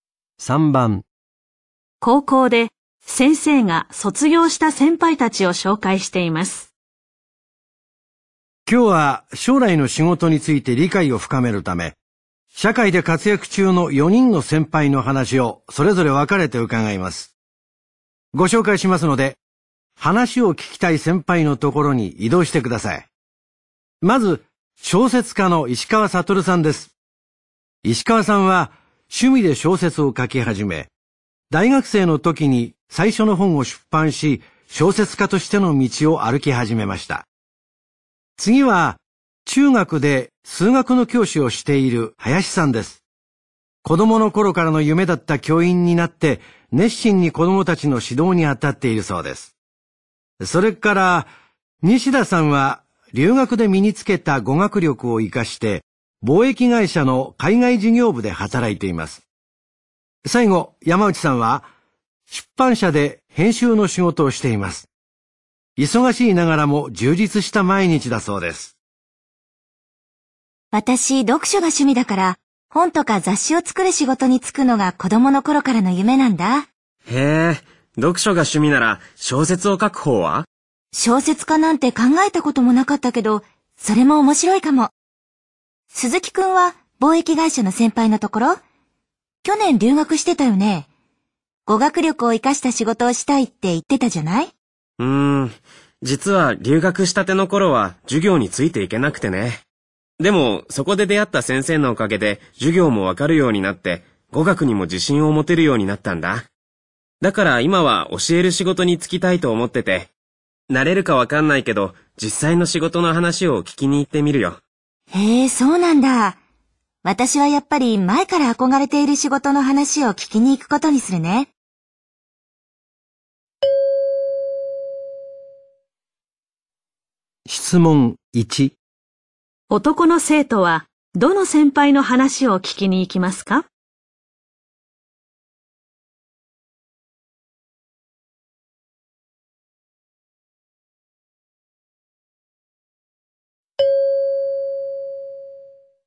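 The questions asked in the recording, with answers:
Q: 男の生徒はどの先輩の話を聞きに行きますか?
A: 数学教師の林さん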